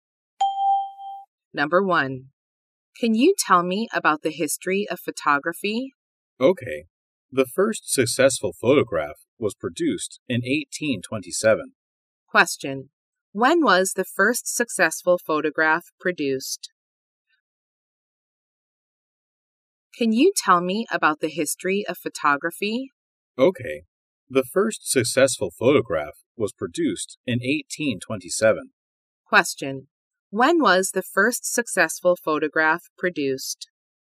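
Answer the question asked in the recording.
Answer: In 1827.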